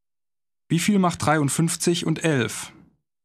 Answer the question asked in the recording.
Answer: 64.